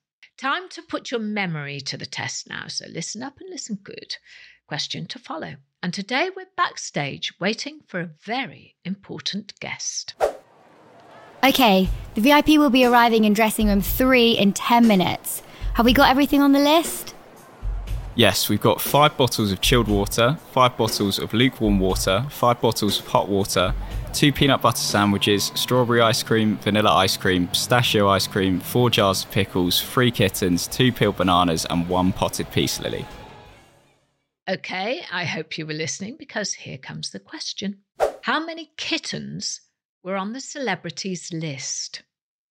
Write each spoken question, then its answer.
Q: How many kittens were on the celebrities list?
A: that very demanding celebrity asked for three kittens.